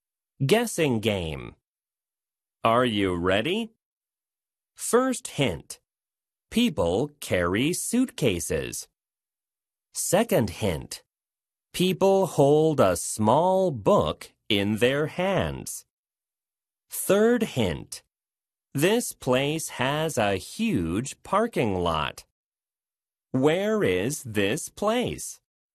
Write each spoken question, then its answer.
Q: Where is this place?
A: 바로바로 공항입니다.